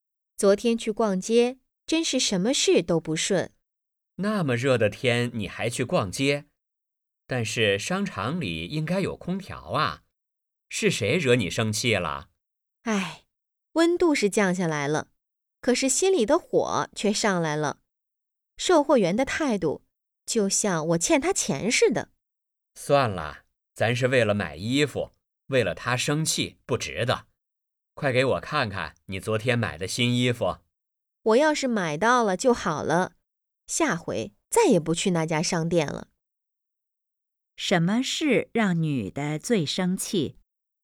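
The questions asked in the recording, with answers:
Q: 什么事让女的最生气?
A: 售货员的态度不好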